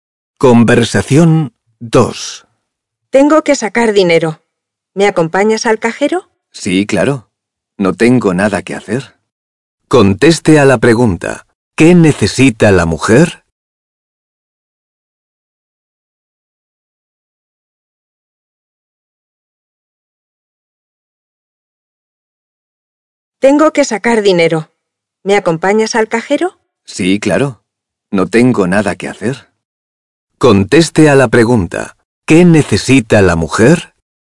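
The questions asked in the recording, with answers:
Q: ¿Qué necesita la mujer?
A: Sacar dinero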